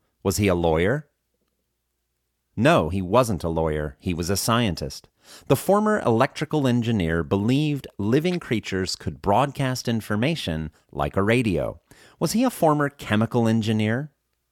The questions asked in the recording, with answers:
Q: Was he a former chemical engineer?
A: No, he wasn't a former chemical engineer.